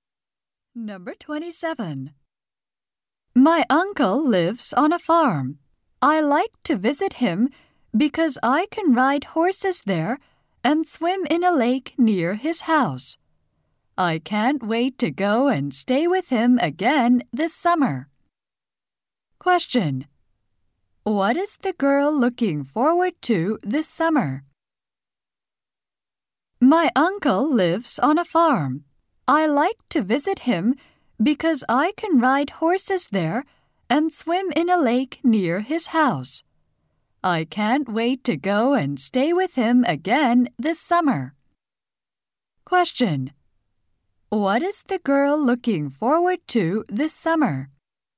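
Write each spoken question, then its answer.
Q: What is the girl looking forward to this summer?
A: Staying with her uncle on his farm.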